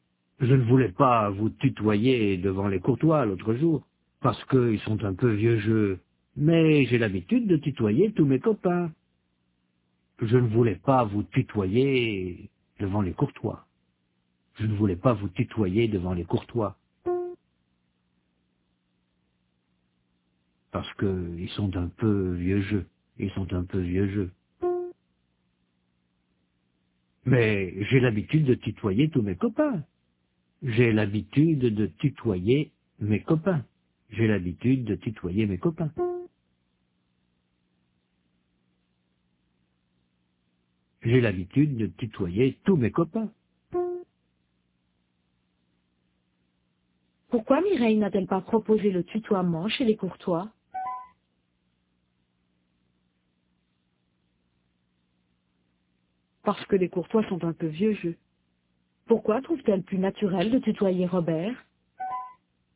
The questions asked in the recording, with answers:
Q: Pourquoi trouve-t-elle plus naturel de tutoyer Robert ?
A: Parce qu'elle tutoie tous ses copains.